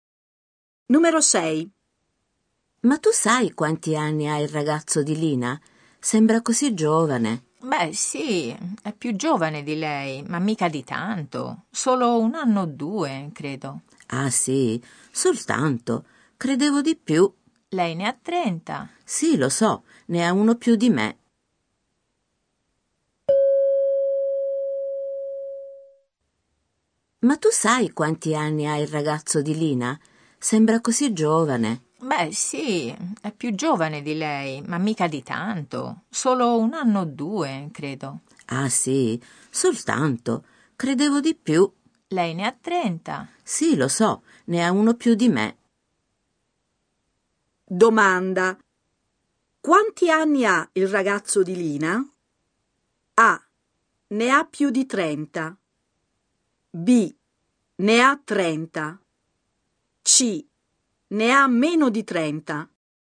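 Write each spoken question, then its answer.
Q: Domanda. Quanti anni ha il ragazzo di Lina?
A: C: Ne ha meno di 30.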